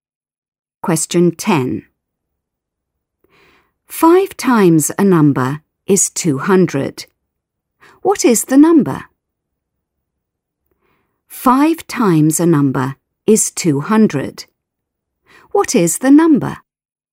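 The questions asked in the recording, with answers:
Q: 5 times a number is 200. What is the number?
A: 40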